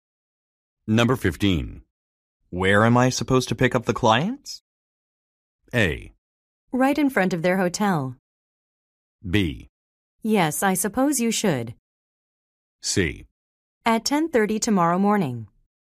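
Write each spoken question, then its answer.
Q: Where am I supposed to pick up the clients?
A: A: Right in front of their hotel.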